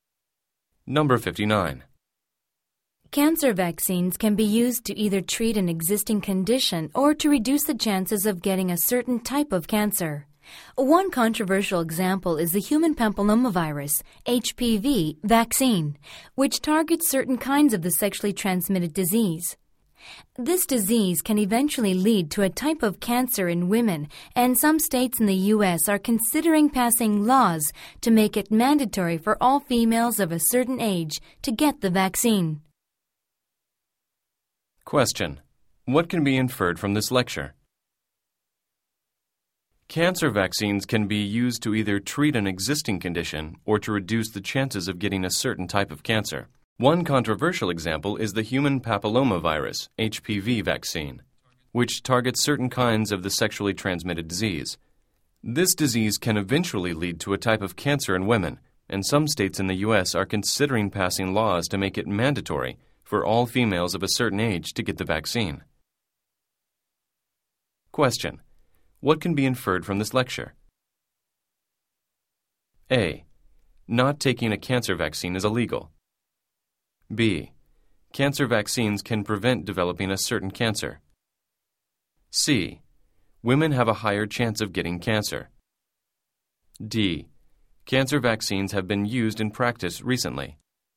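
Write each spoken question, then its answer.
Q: what can be inferred from this lecture?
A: B: Cancer vaccines can prevent developing a certain cancer.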